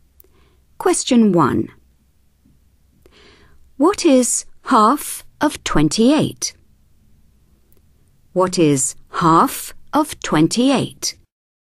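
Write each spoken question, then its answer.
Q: What is half of 28?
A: 14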